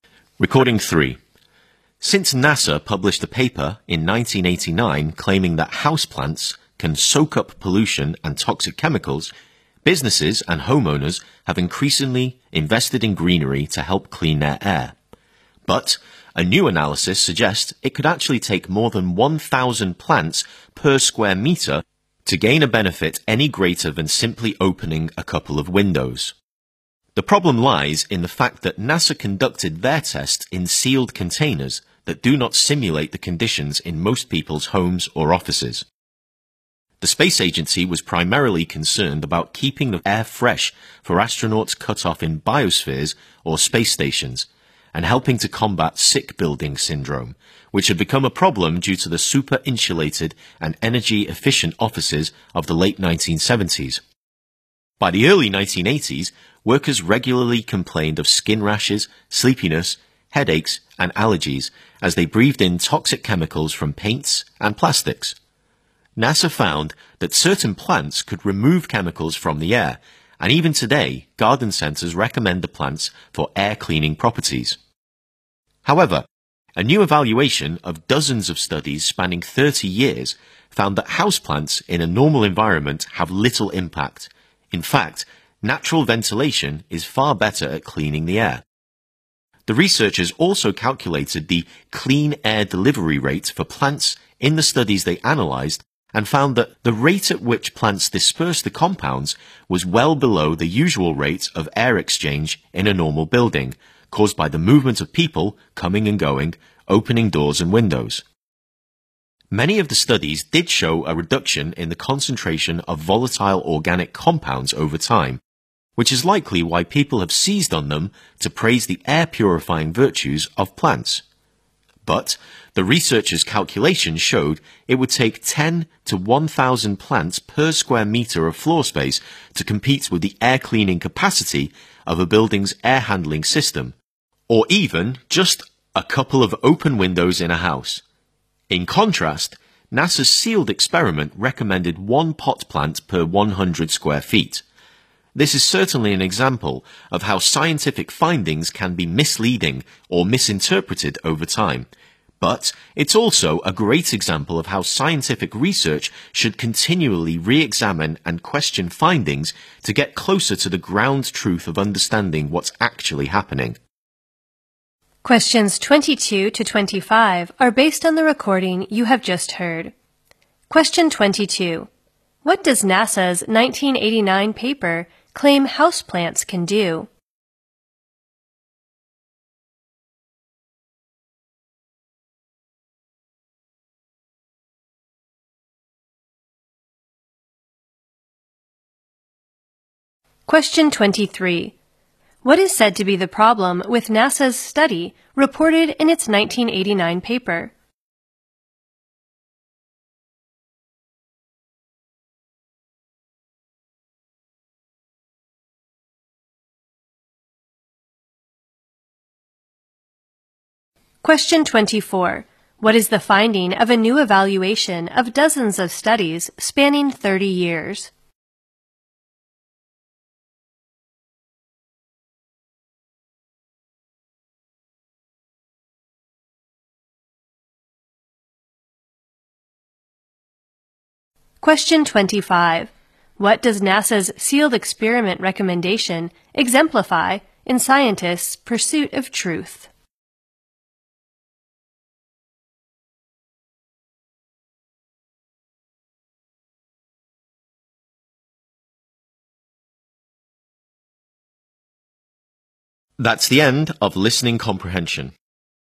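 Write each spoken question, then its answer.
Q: What does NASA's 1989 paper claim houseplants can do?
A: Soak up pollution and toxic chemicals

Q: What is said to be the problem with NASA's study reported in its 1989 paper?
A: The tests were done in sealed containers that don't simulate conditions in homes or offices

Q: What is the finding of a new evaluation of dozens of studies spanning 30 years?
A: Houseplants in a normal environment have little impact on air quality

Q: What does NASA's sealed experiment recommendation exemplify in scientists' pursuit of truth?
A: Scientific findings can be misleading or misinterpreted over time, and research should keep re-examining them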